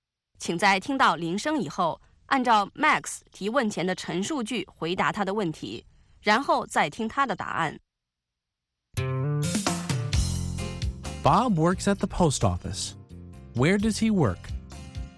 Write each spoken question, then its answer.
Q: Where does he work?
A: He works at the post office.